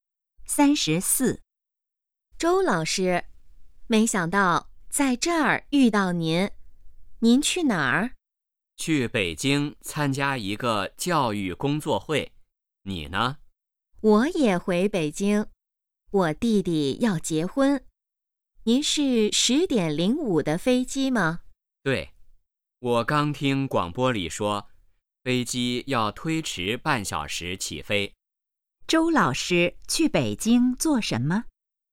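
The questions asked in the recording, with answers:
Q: 周老师去北京做什么?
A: 参加一个教育工作会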